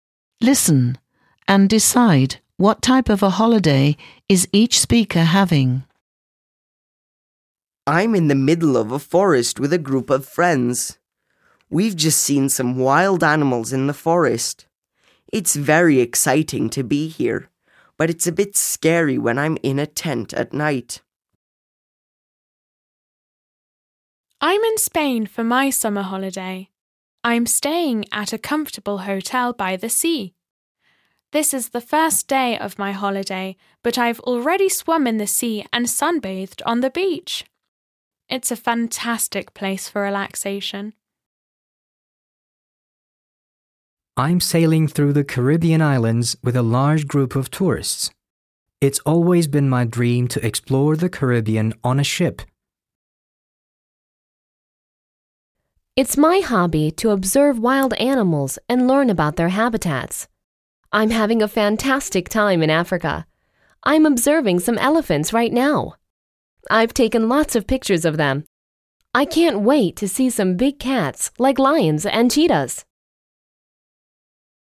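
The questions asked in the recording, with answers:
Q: Listen and decide what type of a holiday is each speaker having.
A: camping holiday in a forest

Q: Listen and decide what type of a holiday is each speaker having.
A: beach holiday at a seaside hotel

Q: Listen and decide what type of a holiday is each speaker having.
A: cruise

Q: Listen and decide what type of a holiday is each speaker having.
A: safari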